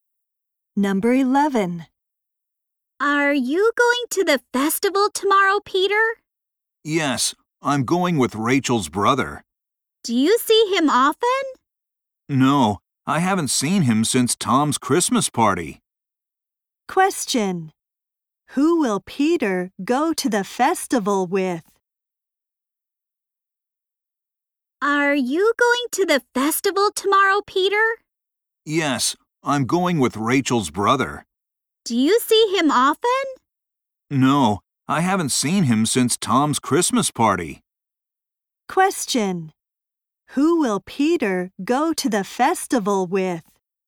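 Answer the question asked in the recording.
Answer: Rachel's brother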